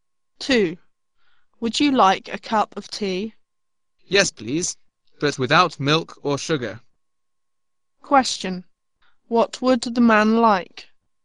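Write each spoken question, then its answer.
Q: What would the man like?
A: A cup of tea without milk or sugar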